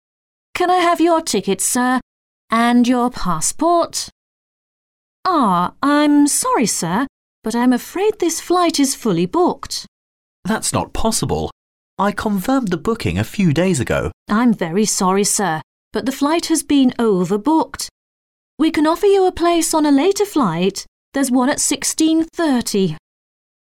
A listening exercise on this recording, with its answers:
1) Where does the conversation probably take place?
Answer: At an airport.

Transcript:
W: Can I have your ticket, sir? And your passport? Ah, I'm sorry, sir, but I'm afraid this flight is fully booked.
M: That's not possible. I confirmed the booking a few days ago.
W: I'm very sorry, sir, but the flight has been overbooked. We can offer you a place on a later flight.